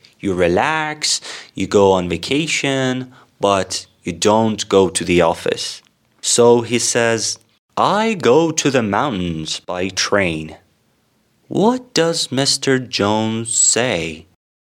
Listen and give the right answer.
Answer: Yes, he says, I go to the mountains by train.